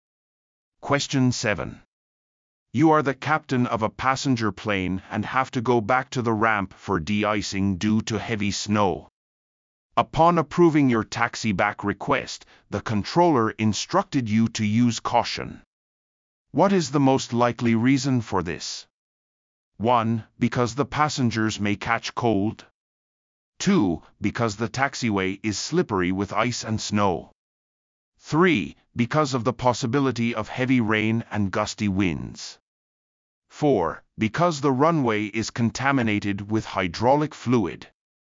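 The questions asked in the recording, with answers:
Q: What is the most likely reason for this?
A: 2: Because the taxiway is slippery with ice and snow.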